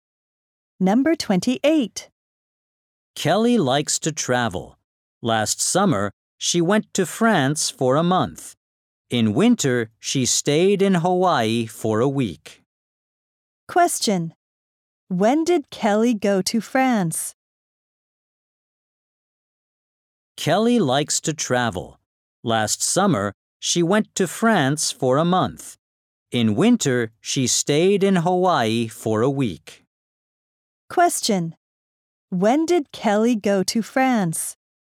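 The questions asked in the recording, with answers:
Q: When did Kelly go to France?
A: Last summer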